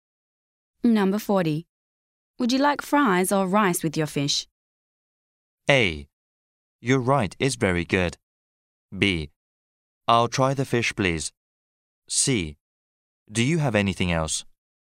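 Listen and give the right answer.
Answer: C: Do you have anything else?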